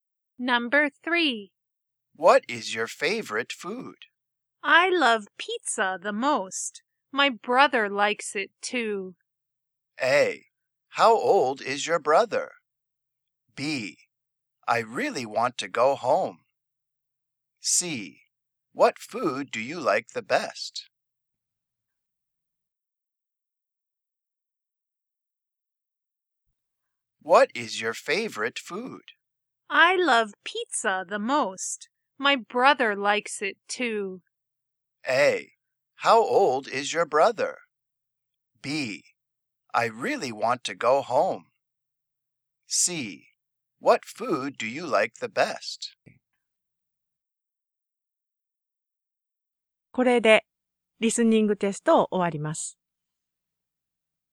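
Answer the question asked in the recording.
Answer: A: How old is your brother?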